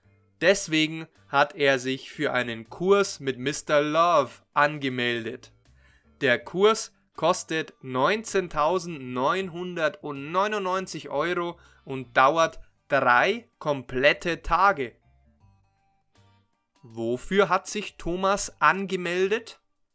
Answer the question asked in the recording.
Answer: Für einen Kurs. Er hat sich für einen Kurs angemeldet.